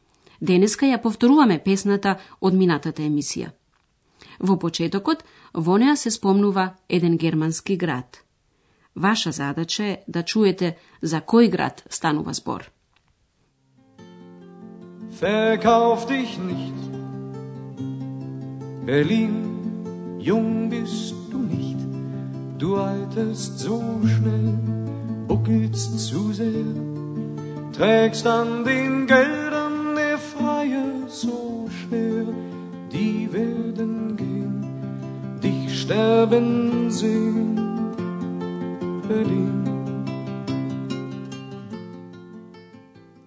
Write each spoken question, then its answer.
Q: Vaša zadaća je da čujete za koji grad stanuva zbor.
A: Берлин. Берлин.